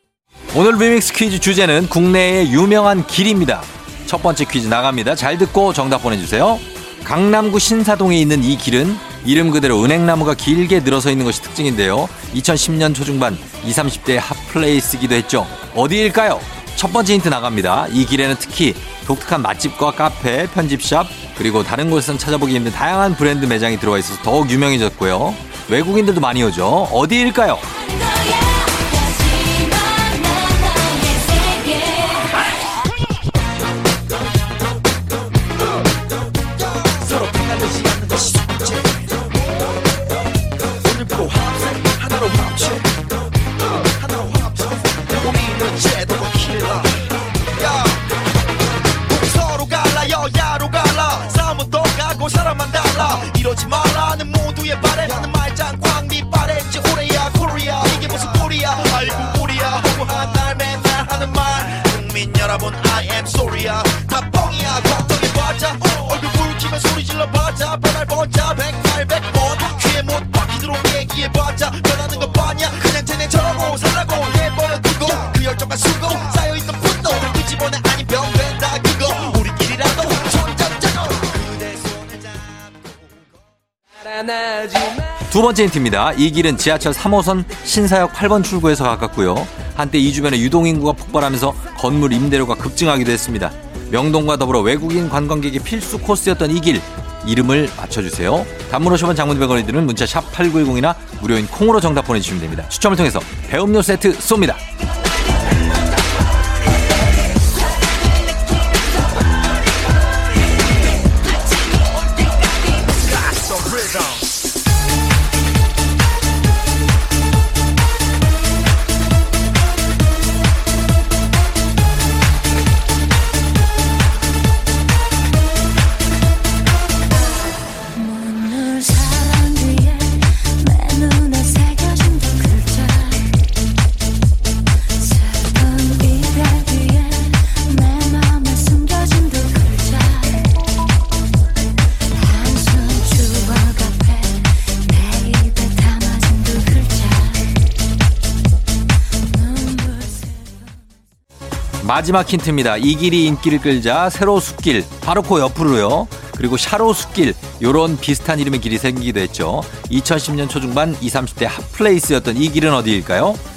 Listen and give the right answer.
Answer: 정답은 바로 두구두구두구두구두구두구두구 가로수길이죠.